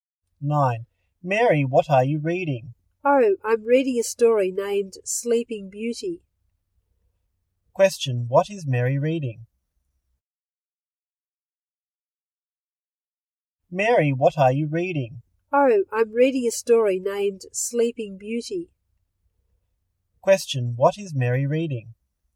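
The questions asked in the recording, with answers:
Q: Question, what is Mary reading?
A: A story named Sleeping Beauty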